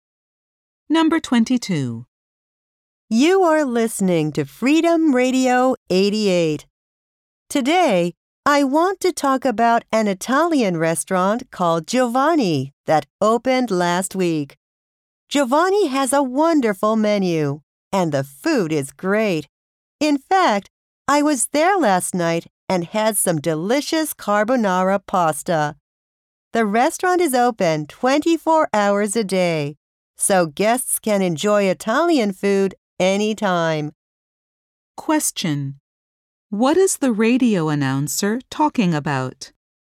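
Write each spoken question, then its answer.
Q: What is the radio announcer talking about?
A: A new Italian restaurant called Giovanni.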